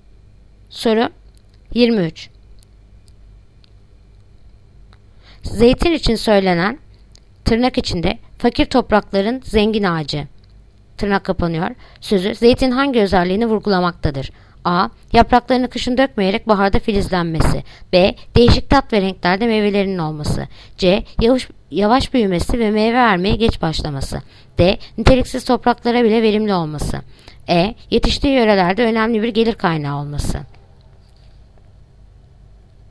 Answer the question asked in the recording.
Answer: Yanıt: Diyarbakır. Niteliksiz topraklarda bile verimli olması.